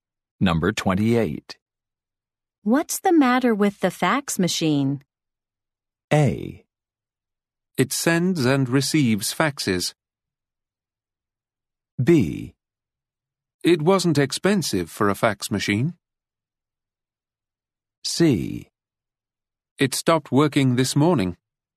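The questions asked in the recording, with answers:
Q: What's the matter with the fax machine?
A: C: It stopped working this morning.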